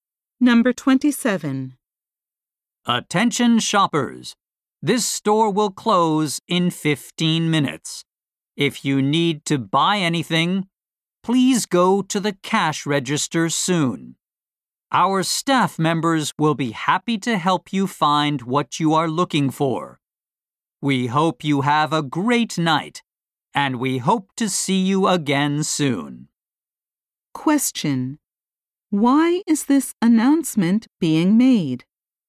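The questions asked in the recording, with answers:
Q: Why is this announcement being made?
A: The store will close in 15 minutes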